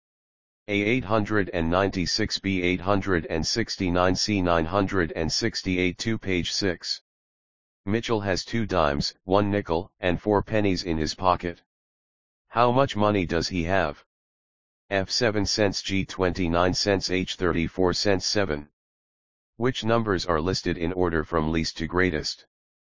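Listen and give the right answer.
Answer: G: 29 cents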